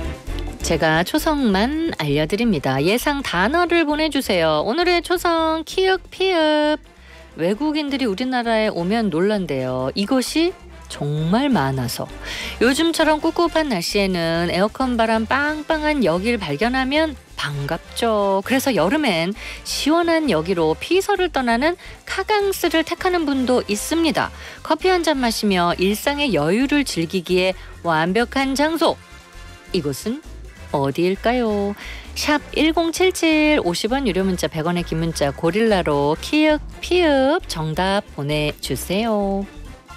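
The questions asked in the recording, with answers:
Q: 이곳은 어디일까요?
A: 카페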